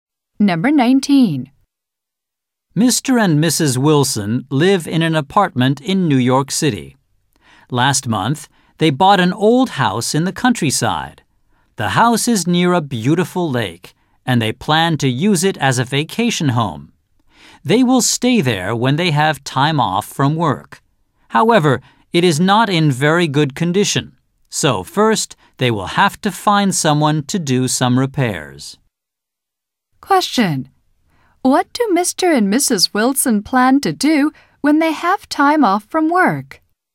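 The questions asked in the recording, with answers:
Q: What do Mr. and Mrs. Wilson plan to do when they have time off from work?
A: Stay at their new house in the countryside (vacation home).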